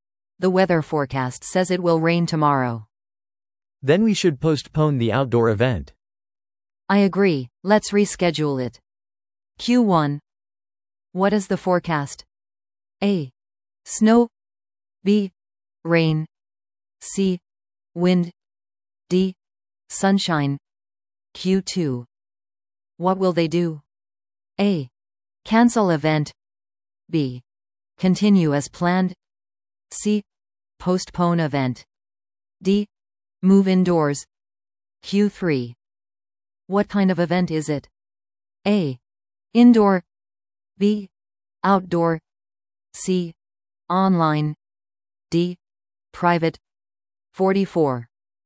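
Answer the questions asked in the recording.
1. B: Rain.
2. C: Postpone event.
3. B: Outdoor.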